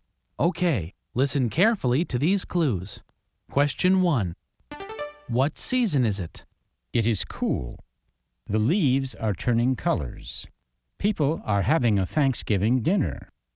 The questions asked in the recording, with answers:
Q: What season is it?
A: That's right, it's fall.